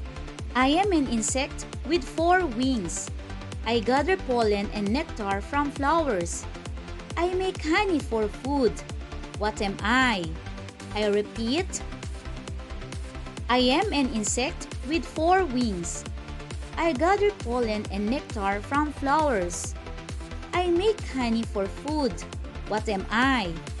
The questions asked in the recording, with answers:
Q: I make honey for food. What am I?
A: The answer is B.